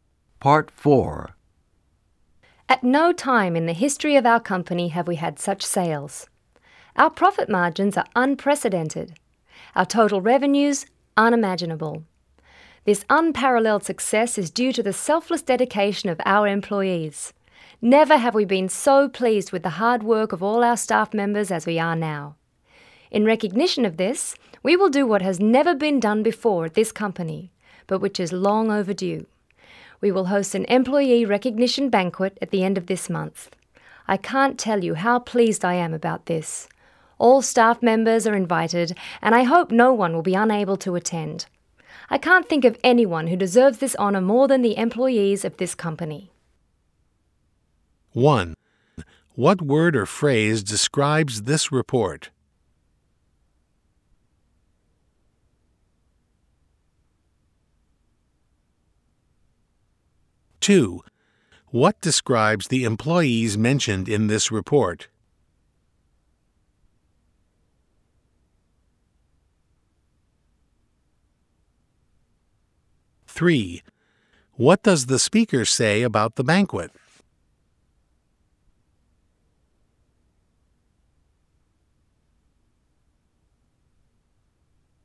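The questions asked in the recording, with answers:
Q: What describes the employees mentioned in this report?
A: Selfless, dedicated and hardworking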